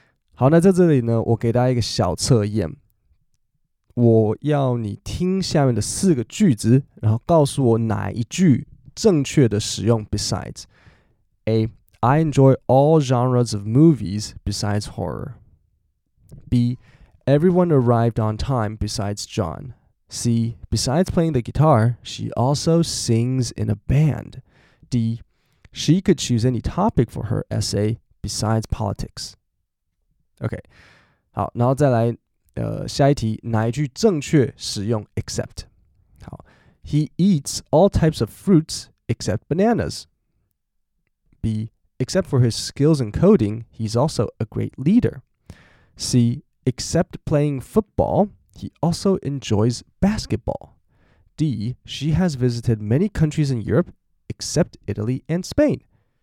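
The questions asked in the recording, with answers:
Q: 我要你听下面的四个句子,然后告诉我哪一句正确的使用 besides。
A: C: besides playing the guitar, she also sings in a band.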